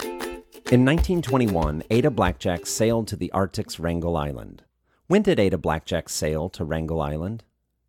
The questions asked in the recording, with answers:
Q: When did Ada Blackjack sail to Wrangel Island?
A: Ada Blackjack sailed to Wrangel Island in 1921.